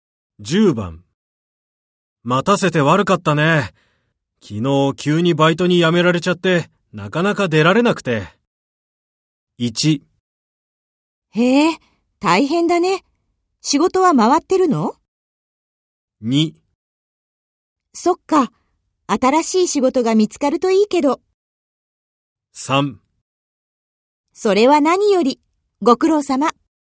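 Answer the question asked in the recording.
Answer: 1: へえ、大変だね。仕事は回ってるの?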